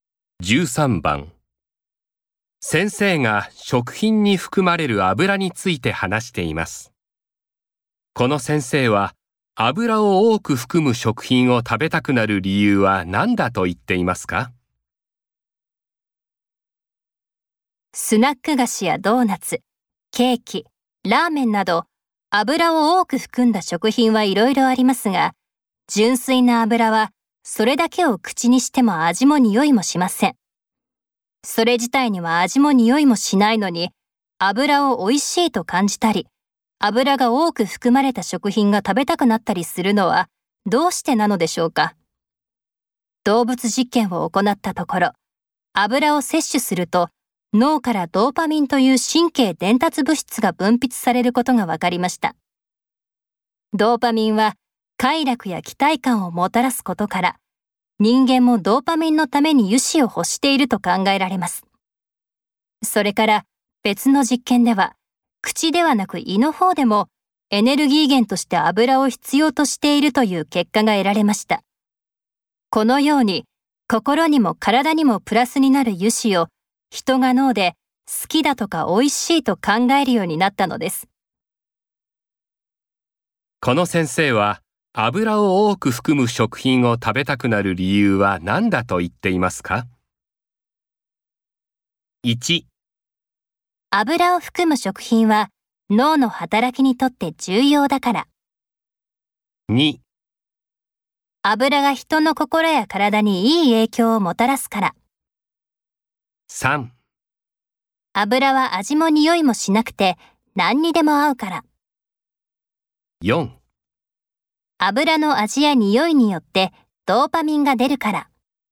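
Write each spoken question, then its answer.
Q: この先生は油を多く含む食品を食べたくなる理由は何だと言っていますか?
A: 2: 油が人の心や体にいい影響をもたらすから。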